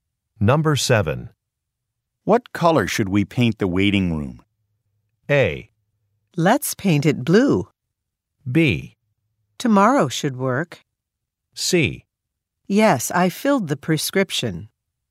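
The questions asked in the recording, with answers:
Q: What color should we paint the waiting room?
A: A: Let's paint it blue.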